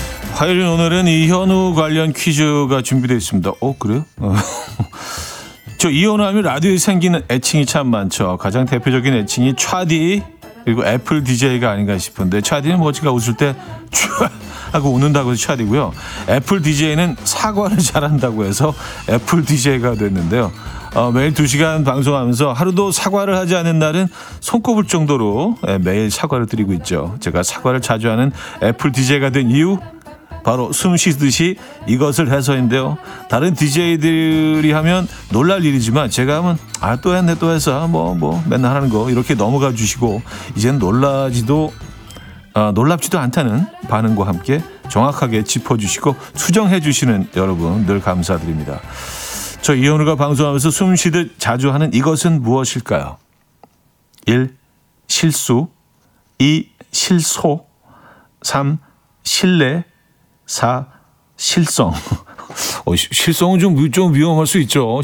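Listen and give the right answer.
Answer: 1: 실수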